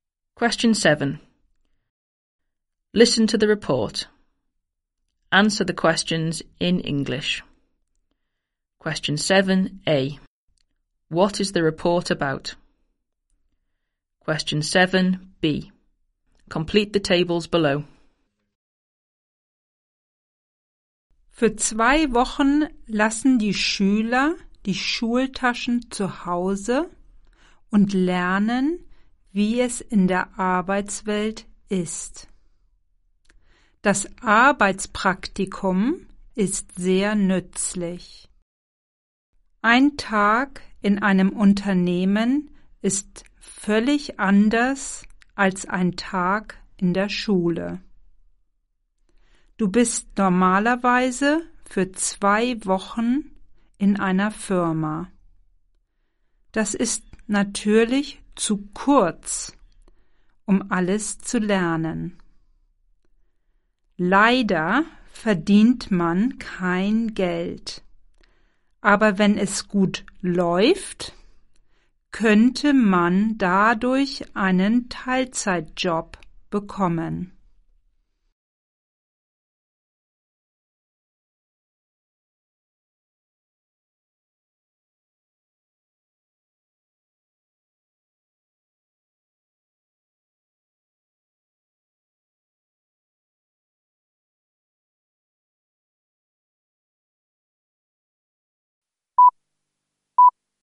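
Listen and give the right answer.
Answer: Work experience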